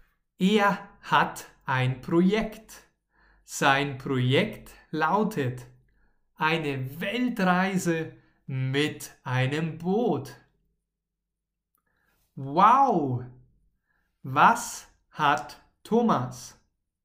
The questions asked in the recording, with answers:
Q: Wow! Was hat Thomas?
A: Ein Projekt. Er hat ein neues Projekt.